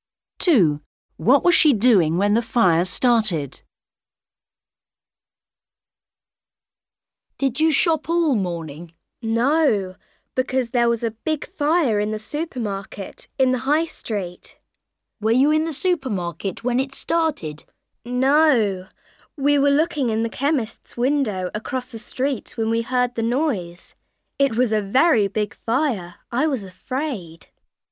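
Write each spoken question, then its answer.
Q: What was she doing when the fire started?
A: looking in the chemist's window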